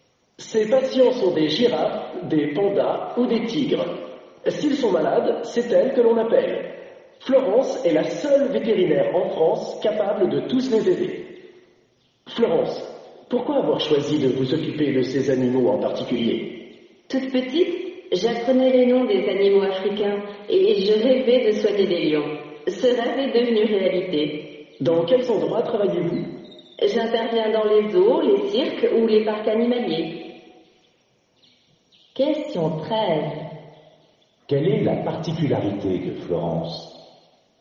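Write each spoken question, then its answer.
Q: Quelle est la particularité de Florence?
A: Elle est la seule vétérinaire en France capable de soigner tous ces animaux sauvages (girafes, pandas, tigres).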